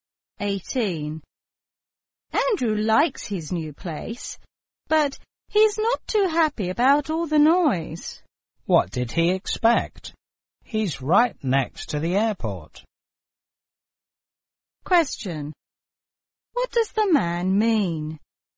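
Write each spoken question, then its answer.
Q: What does the man mean?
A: Andrew should have expected noise because he lives next to the airport.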